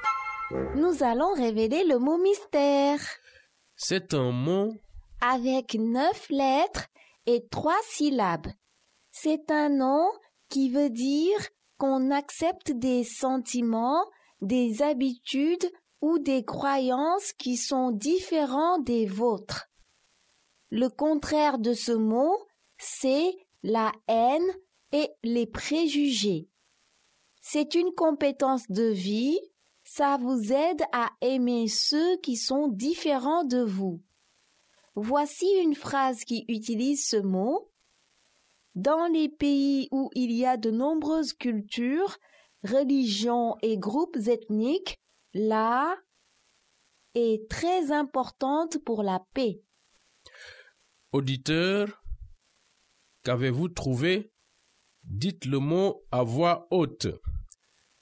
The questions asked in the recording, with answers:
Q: Auditeur, qu'avez-vous trouvé?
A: Le mot mystère est tolérance.